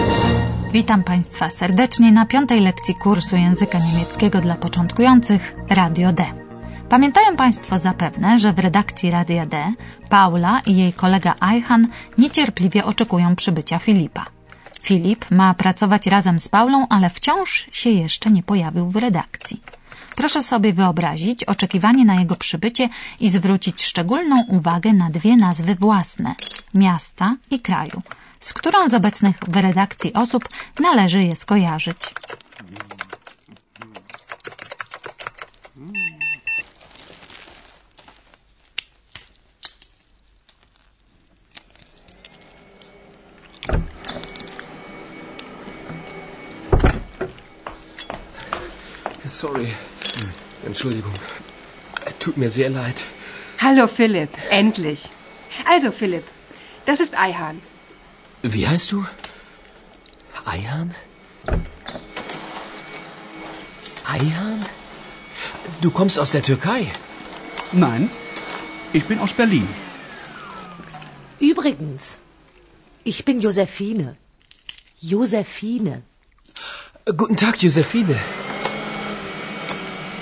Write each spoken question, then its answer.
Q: Proszę sobie wyobrazić oczekiwanie na jego przybycie i zwrócić szczególną uwagę na dwie nazwy własne – miasta i kraju, z którą z obecnych w redakcji osób należy je skojarzyć.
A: Berlin, Berlin i Turcja, Türkei.